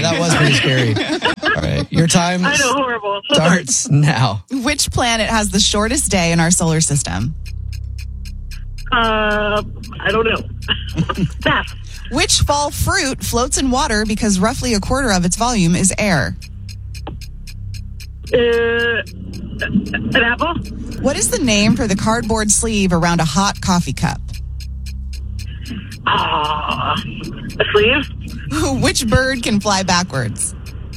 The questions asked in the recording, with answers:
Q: Which fall fruit floats in water because roughly a quarter of its volume is air?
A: Apples do float because water is roughly a quarter of its volume.